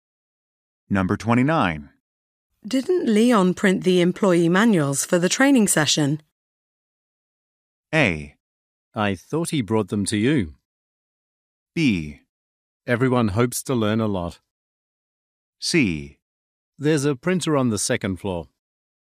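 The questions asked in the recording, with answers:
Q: Didn't Leon print the employee manuals for the training session?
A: A: I thought he brought them to you.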